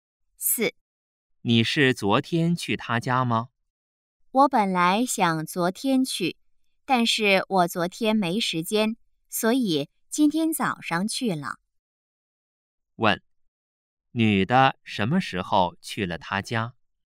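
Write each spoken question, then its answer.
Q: 女的什么时候去了他家?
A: 今天早上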